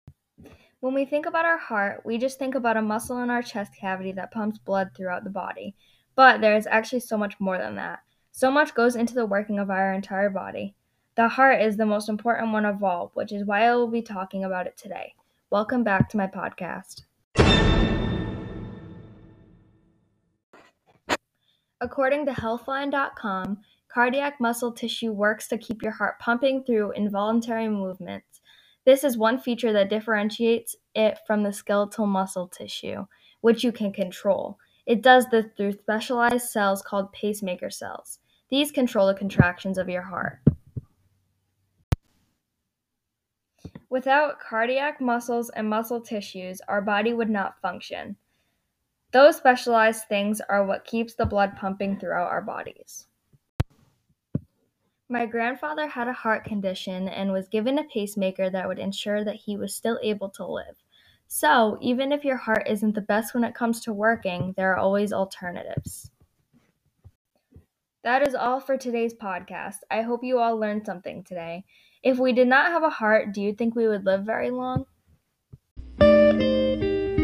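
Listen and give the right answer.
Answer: No, without the heart our body would not function.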